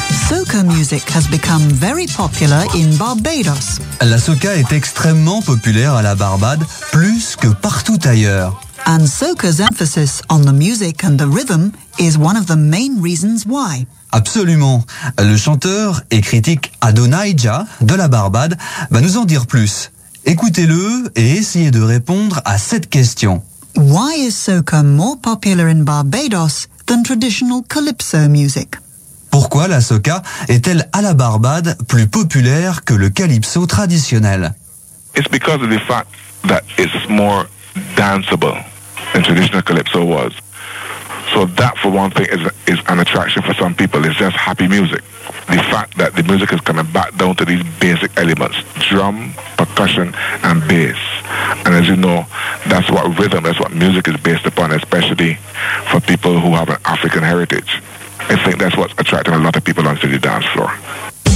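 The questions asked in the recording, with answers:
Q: Why is soca more popular in Barbados than traditional calypso music?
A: It is more danceable than traditional calypso; it is happy music based on drum, percussion and bass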